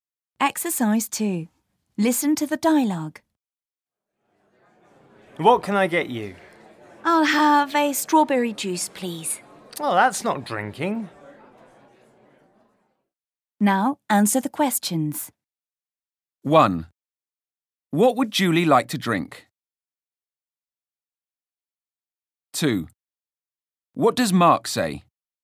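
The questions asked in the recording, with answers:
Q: What would Julie like to drink?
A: A strawberry juice

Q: What does Mark say?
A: Well, that's not drinking.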